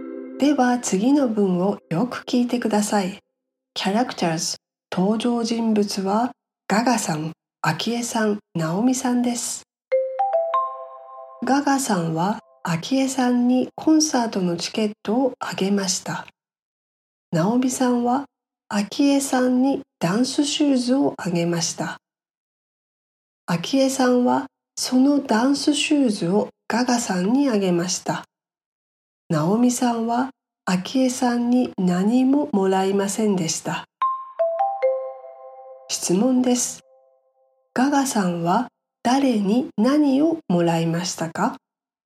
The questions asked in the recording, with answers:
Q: ガガさんは誰に何をもらいましたか?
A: ガガさんはアキエさんにダンスシューズをもらいました。